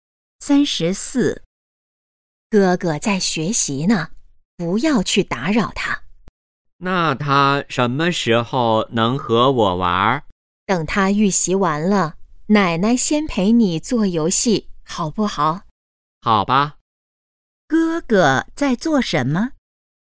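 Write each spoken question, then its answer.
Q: 哥哥在做什么?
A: 预习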